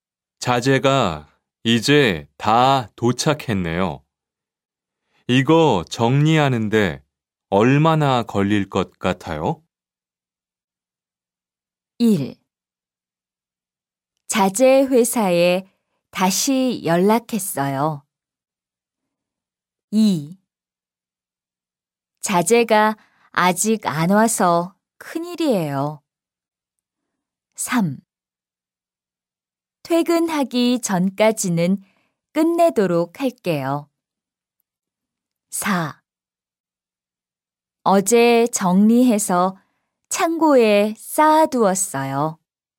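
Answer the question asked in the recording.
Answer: 3: 퇴근하기 전까지는 끝내도록 할게요.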